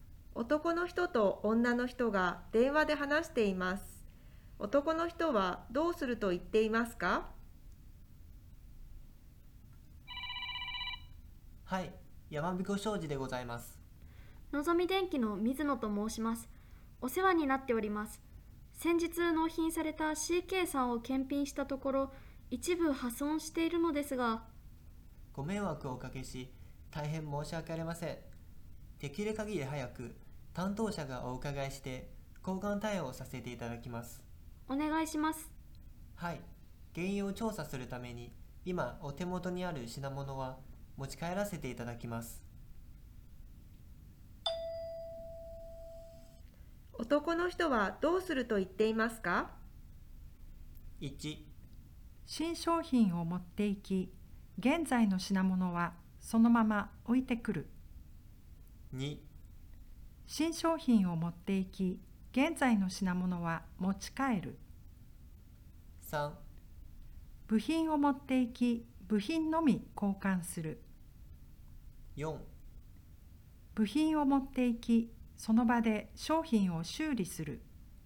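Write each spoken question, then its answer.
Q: 男の人はどうすると言っていますか?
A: 2: 新商品を持っていき、現在の品物は持ち帰る。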